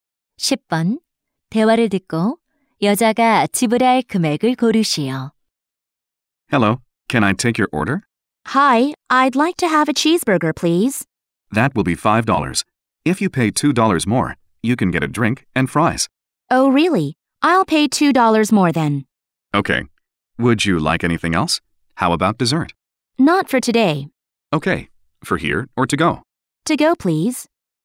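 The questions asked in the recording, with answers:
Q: 대화를 듣고 여자가 지불할 금액을 고르시오.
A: 7달러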